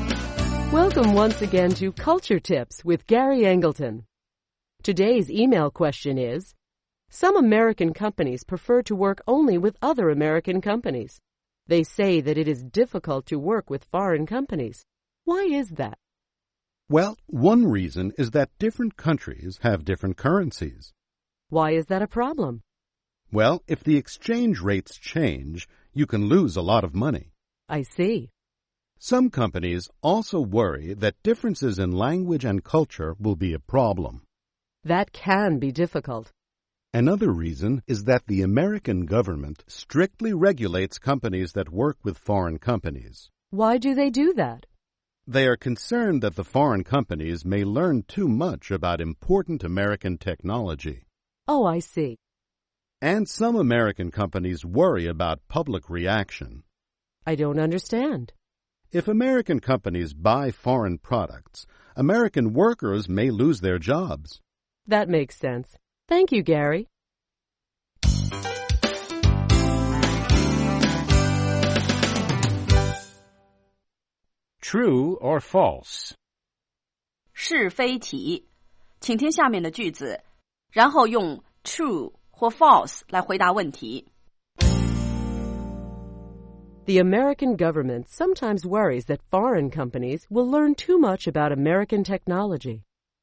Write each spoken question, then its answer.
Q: The American government sometimes worries that foreign companies will learn too much about American technology.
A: True. That's why the American government regulates companies that do business with foreign companies.